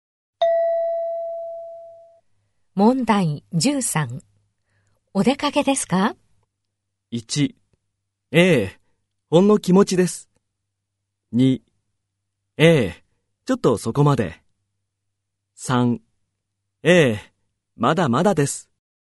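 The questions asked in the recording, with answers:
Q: お出かけですか?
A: 1: ええ、ちょっとそこまで。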